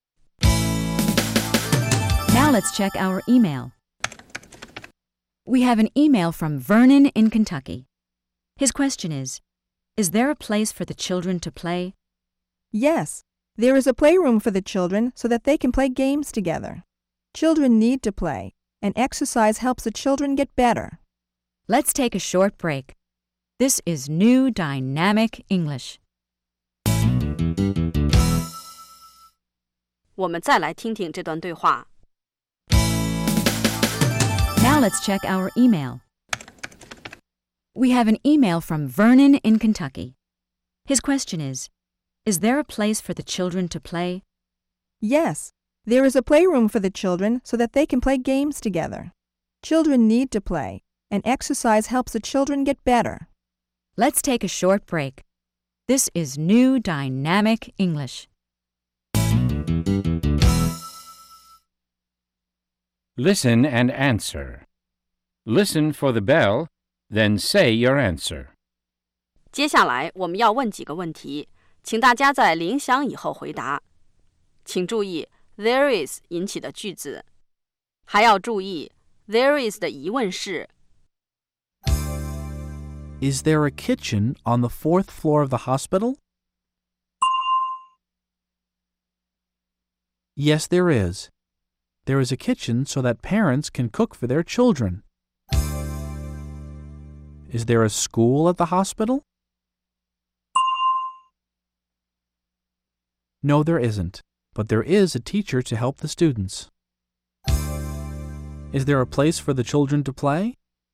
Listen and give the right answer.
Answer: Yes, there is. There's a playroom.